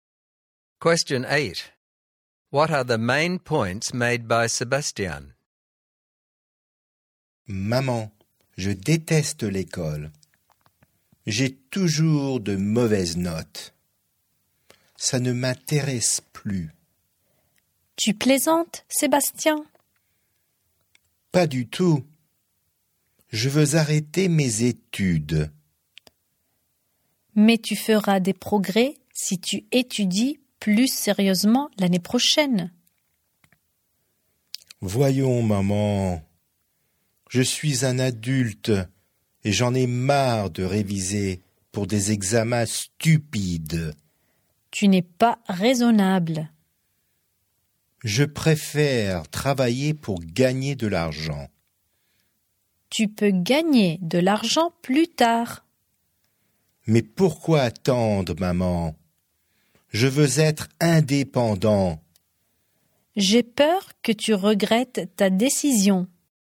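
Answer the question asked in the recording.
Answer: He hates school, always gets bad marks, wants to quit studying, work to earn money and be independent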